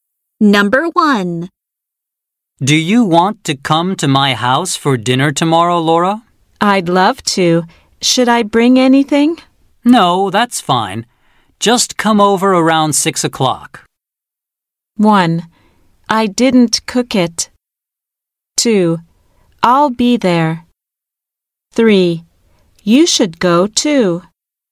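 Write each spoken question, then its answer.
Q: No, that's fine. Just come over around 6 o'clock.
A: 2: I'll be there.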